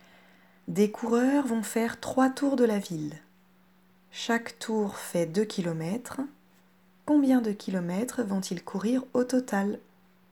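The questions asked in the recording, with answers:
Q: Combien de kilomètres vont-ils courir au total?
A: 6 km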